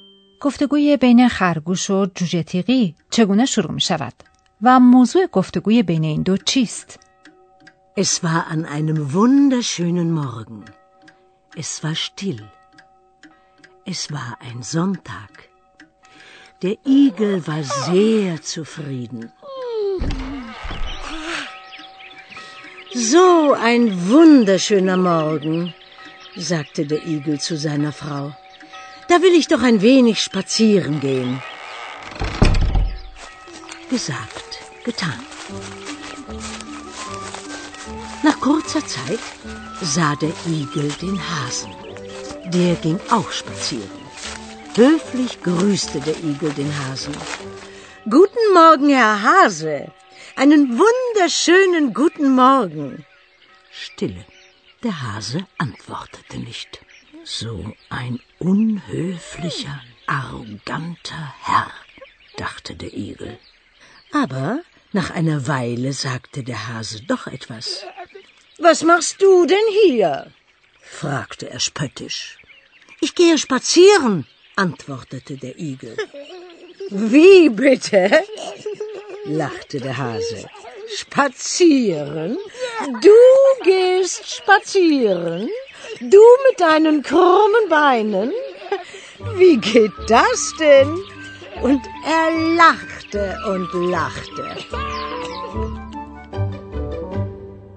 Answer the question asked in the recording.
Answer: گفتگویی بر سر شپتسیرن گین یعنی پیاده روی کردن.